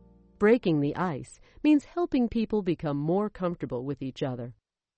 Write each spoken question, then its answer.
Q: Breaking the ice means helping people become more comfortable with each other.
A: True. Small talk and light refreshments are good ways to break the ice at the beginning of a meeting.